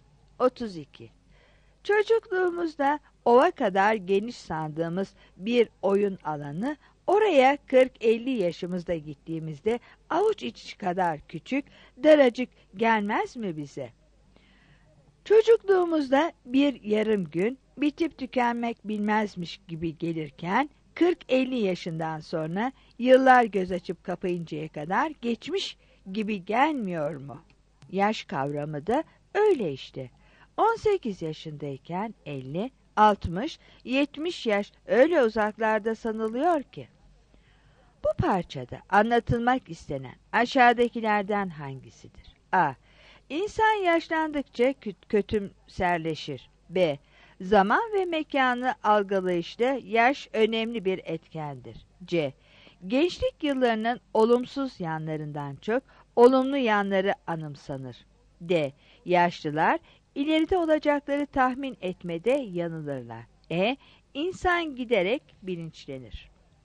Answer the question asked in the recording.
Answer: 32 B